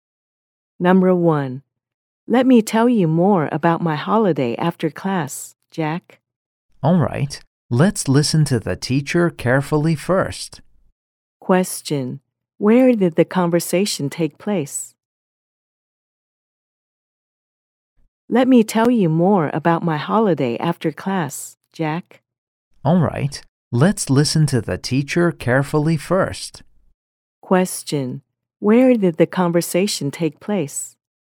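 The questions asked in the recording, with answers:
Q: Question, where did the conversation take place?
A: At school (in the classroom)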